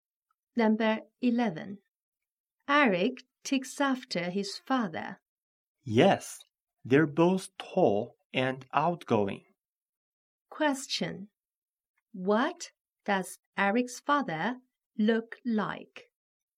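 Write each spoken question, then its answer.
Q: What does Eric's father look like?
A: He is tall.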